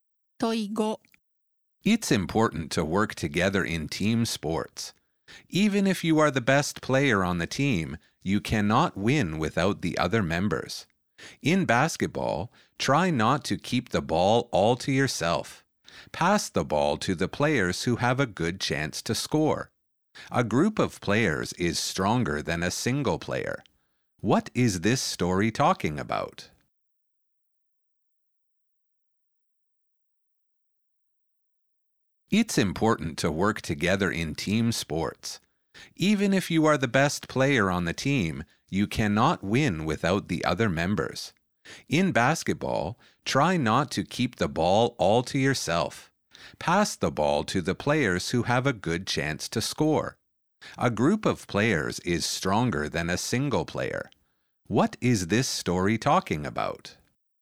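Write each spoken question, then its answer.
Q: What is this story talking about?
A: working together as a team in team sports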